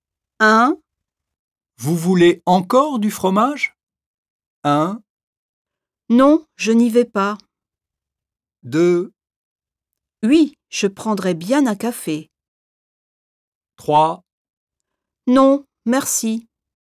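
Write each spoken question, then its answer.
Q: Vous voulez encore du fromage?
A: 3: Non, merci.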